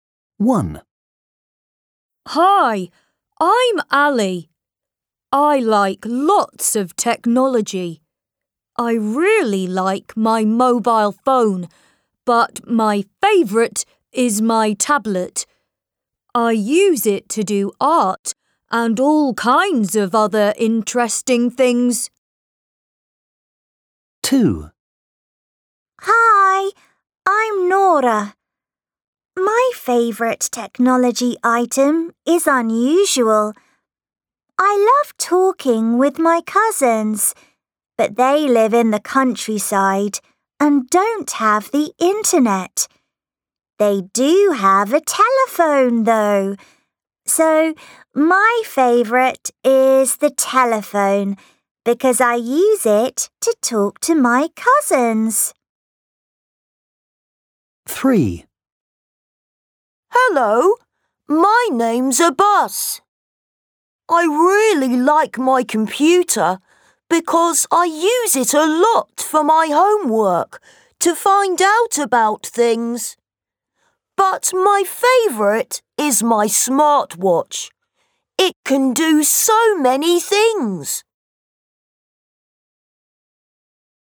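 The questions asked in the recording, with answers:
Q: Which is their favourite?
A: his tablet

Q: Which is their favourite?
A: the telephone

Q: Which is their favourite?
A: his smartwatch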